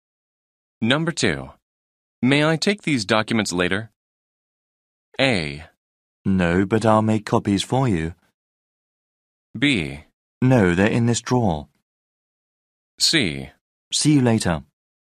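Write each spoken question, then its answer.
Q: May I take these documents later?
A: A: No, but I'll make copies for you.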